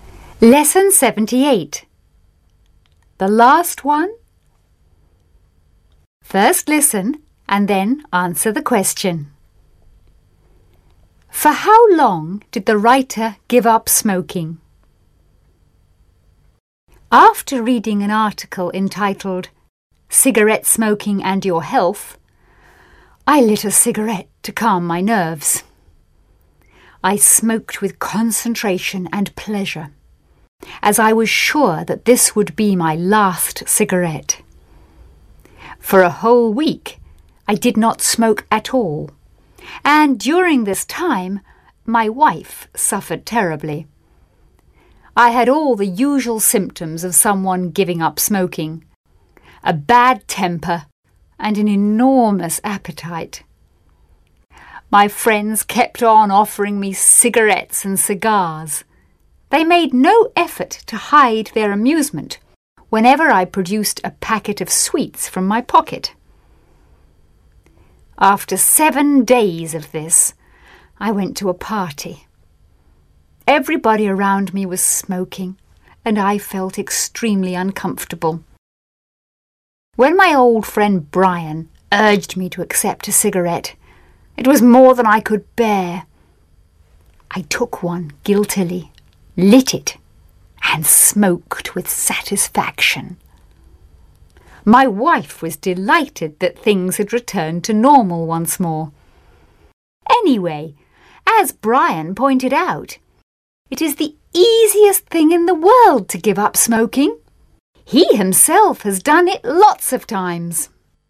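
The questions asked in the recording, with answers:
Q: For how long did the writer give up smoking?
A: For a whole week (7 days)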